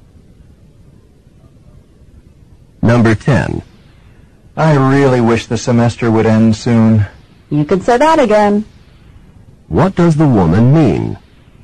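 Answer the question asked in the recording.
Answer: She agrees; she also wants the semester to end.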